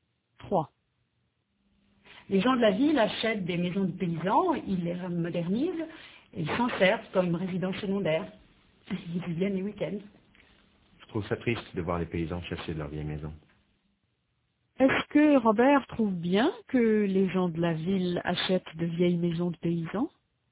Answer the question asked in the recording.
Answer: Non, il trouve ça triste.